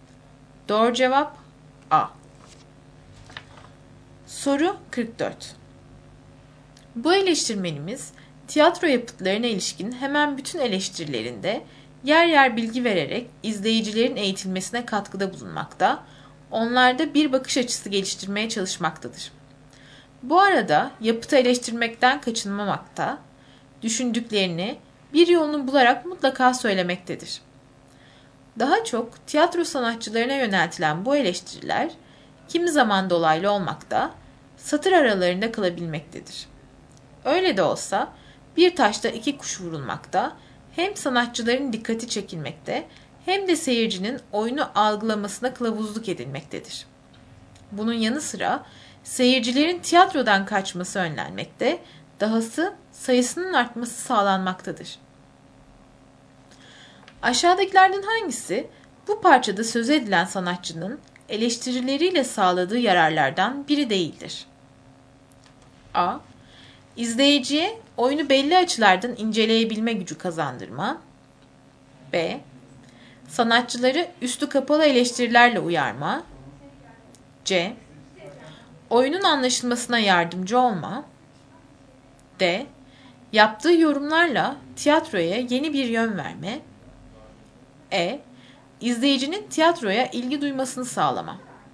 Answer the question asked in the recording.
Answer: Doğru cevap D.